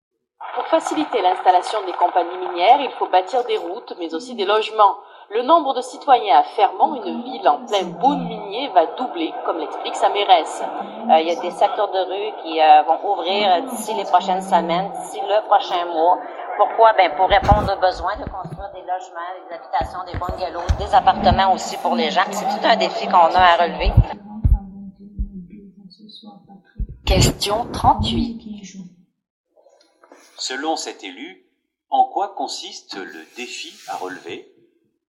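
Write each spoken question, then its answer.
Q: Selon cet élu, en quoi consiste le défi à relever?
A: Construire des logements pour la population qui va doubler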